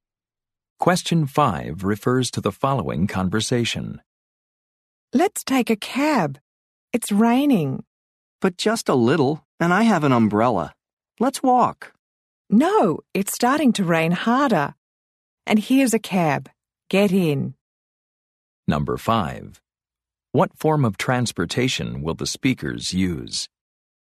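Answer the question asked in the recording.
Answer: A cab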